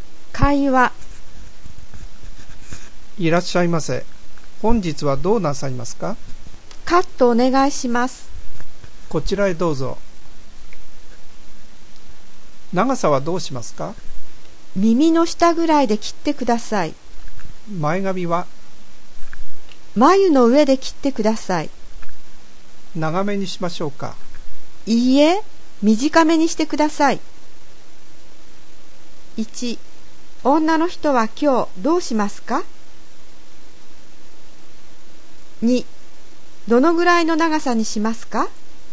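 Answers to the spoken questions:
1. 髪をカットします
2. 耳の下ぐらい(前髪は眉の上で短め)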